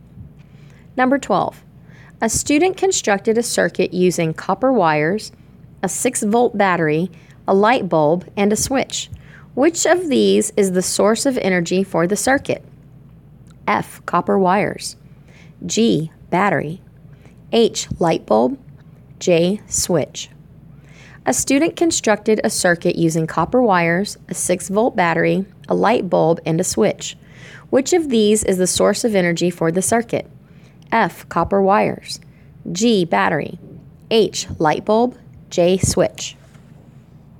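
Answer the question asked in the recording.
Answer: G: Battery.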